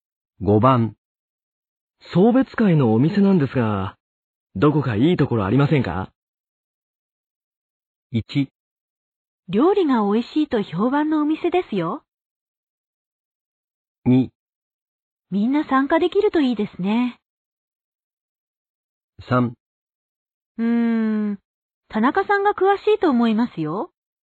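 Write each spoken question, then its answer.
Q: 送別会のお店なんですが、どこかいいところありませんか?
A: 3: 田中さんが詳しいと思いますよ。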